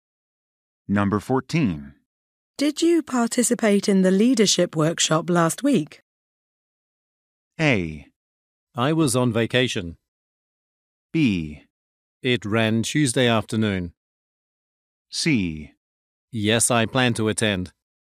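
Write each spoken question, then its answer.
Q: Did you participate in the leadership workshop last week?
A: A: I was on vacation.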